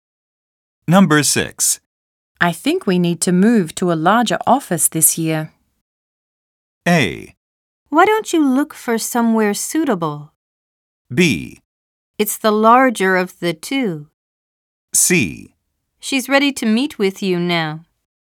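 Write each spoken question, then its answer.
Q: I think we need to move to a larger office this year.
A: A: Why don't you look for somewhere suitable?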